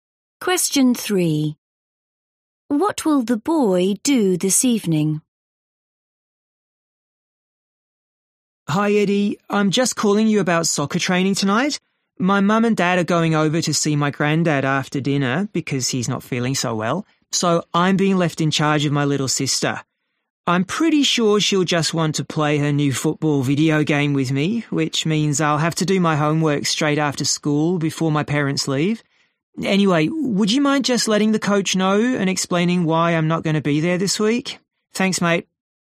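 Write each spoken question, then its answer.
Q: What will the boy do this evening?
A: Look after his little sister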